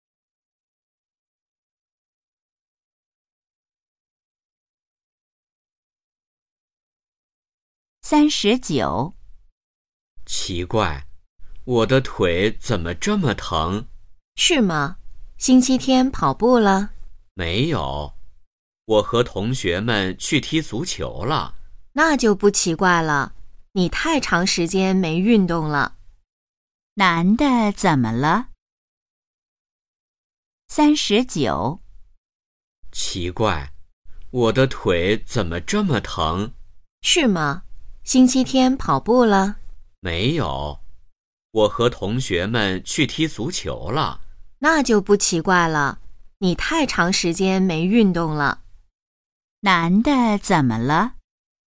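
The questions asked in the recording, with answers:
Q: 男的怎么了?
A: 腿疼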